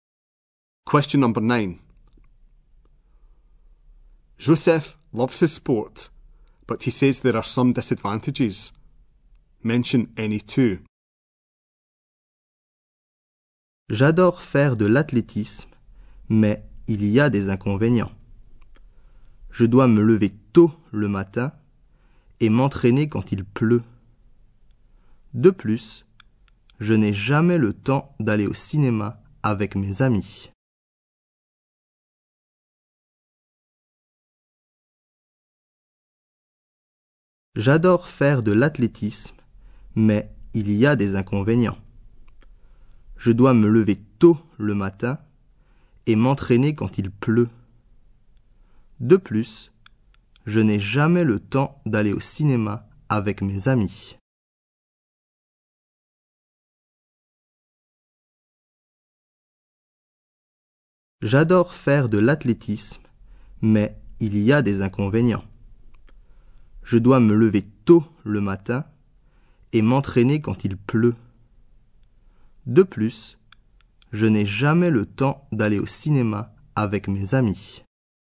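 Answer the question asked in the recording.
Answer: He must get up early, train in the rain, never has time to go to the cinema with friends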